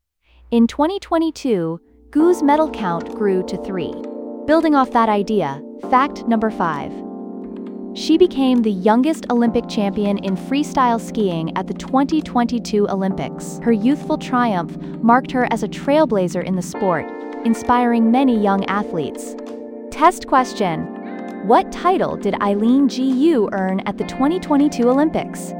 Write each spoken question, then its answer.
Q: What title did Eileen Jiyu earn at the 2022 Olympics?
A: Correct answer. Youngest Olympic champion in freestyle skiing.